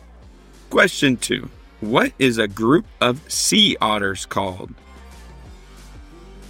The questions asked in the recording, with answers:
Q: What is a group of sea otters called?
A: Raft, bevy, families, lodges, romps, and finally, pods.